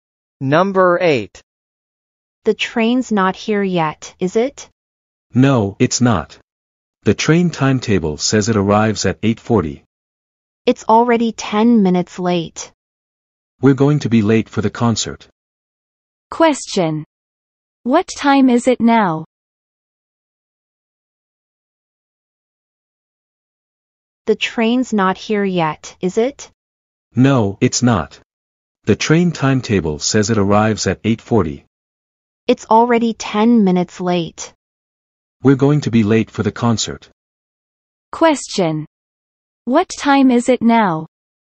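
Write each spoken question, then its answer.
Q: What time is it now?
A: 8:50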